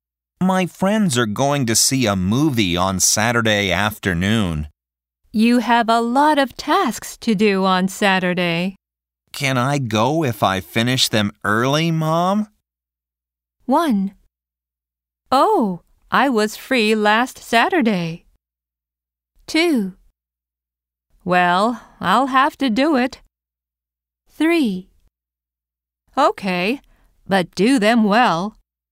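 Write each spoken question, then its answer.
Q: Can I go if I finish them early, Mom?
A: 3: Okay, but do them well.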